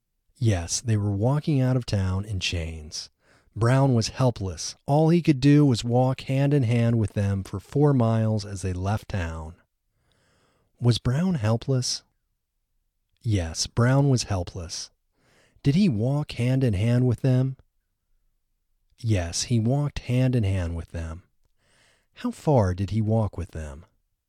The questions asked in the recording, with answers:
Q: How far did he walk with them?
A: He walked for 4 miles with them.